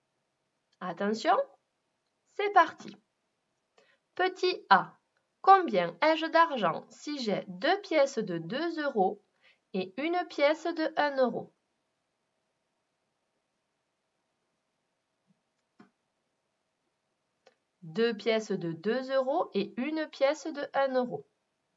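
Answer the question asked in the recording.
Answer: 5 euros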